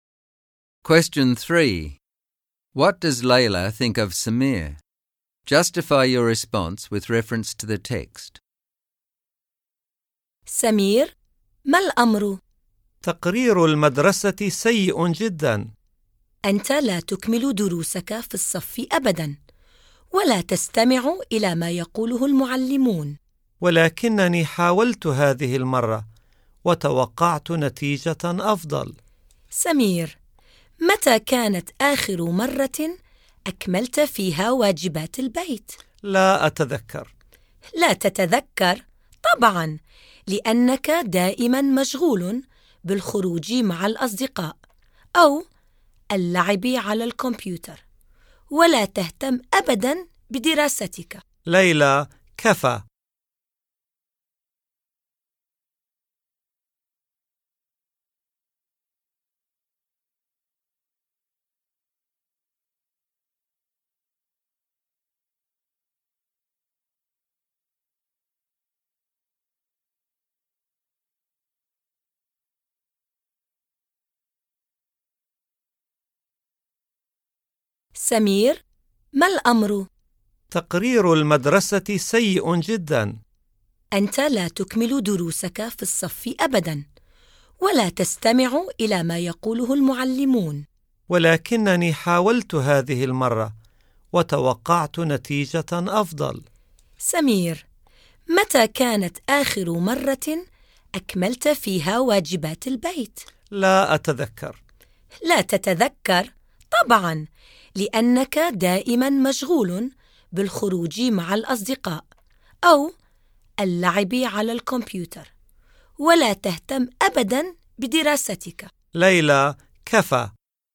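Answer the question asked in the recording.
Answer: She thinks he is lazy and doesn't care about his studies: he never finishes classwork or homework, doesn't listen to teachers, and is always out with friends or playing on the computer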